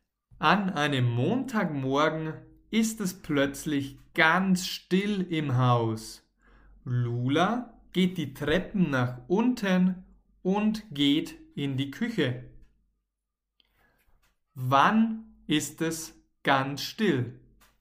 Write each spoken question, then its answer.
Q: Wann ist es ganz still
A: An einem Montagmorgen. Es ist plötzlich ganz still an einem Montagmorgen.